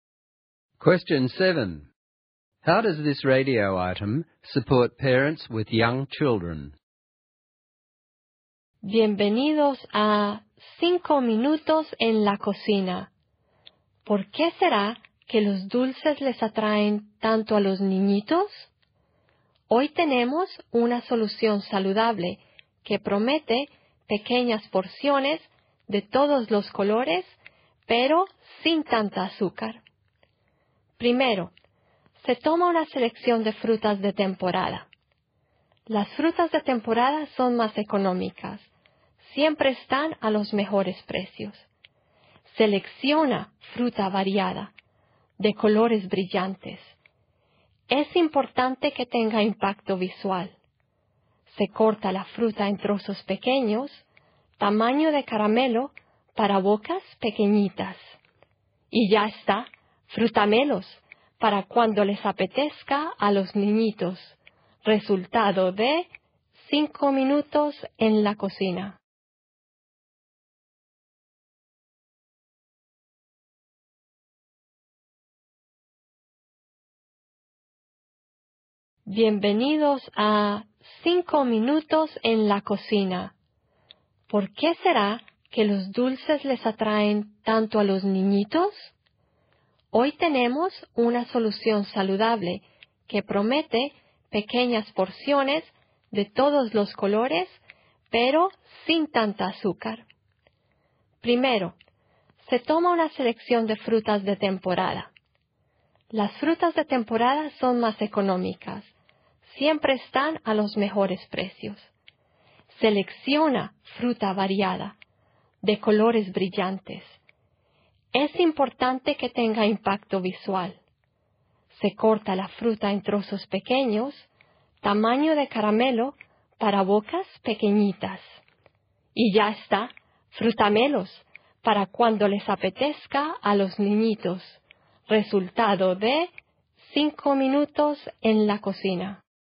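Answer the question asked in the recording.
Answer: It gives a quick, cheap, healthy alternative to sweets: small, colourful, candy-sized pieces of seasonal fruit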